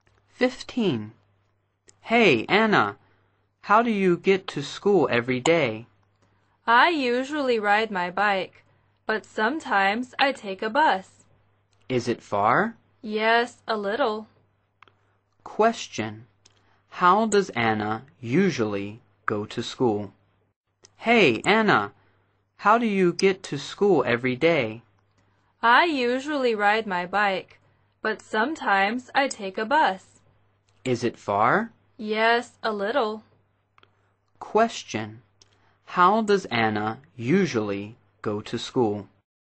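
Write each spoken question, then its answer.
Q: How does Anna usually go to school?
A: By bike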